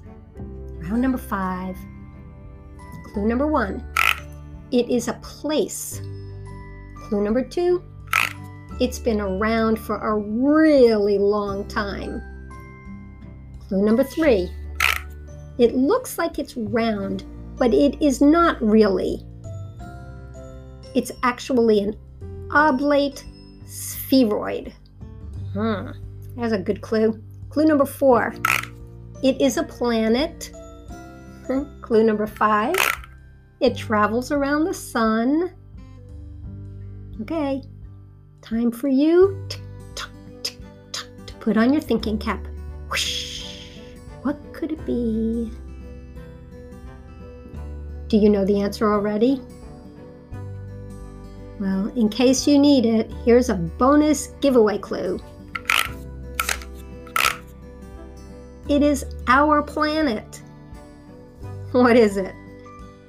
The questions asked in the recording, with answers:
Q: What is it?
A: Did you say the Earth?